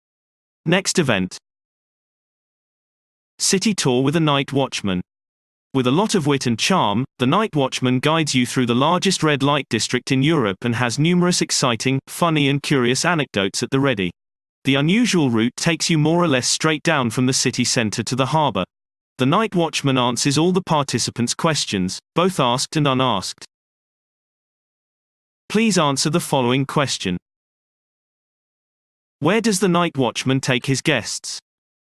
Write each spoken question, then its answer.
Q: Where does the night watchman take his guests?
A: The night watchman leads his guests from the city center to the harbor directly into the largest red light district in Europe.